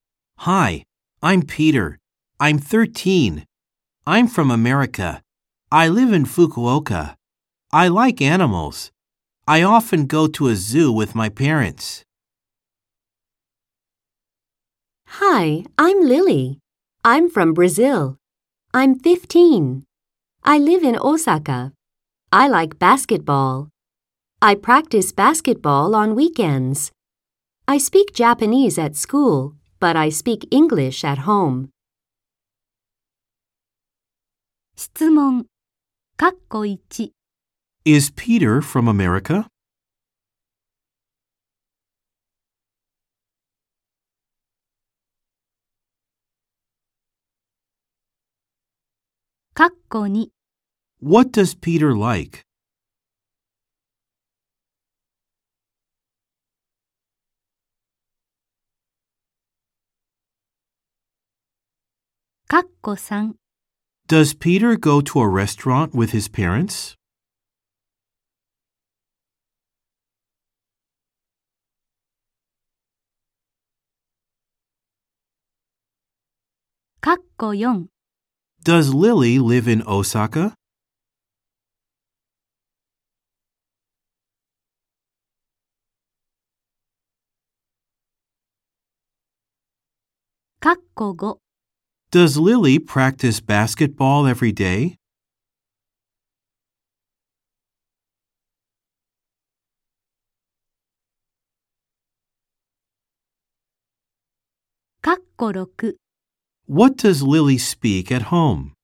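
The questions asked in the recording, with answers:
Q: Is Peter from America?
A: Yes, he is.

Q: What does Peter like?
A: He likes animals.

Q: Does Peter go to a restaurant with his parents?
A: No, he doesn't. He goes to a zoo.

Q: Does Lily live in Osaka?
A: Yes, she does.

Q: Does Lily practice basketball every day?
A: No, she doesn't. She practices on weekends.

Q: What does Lily speak at home?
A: She speaks English.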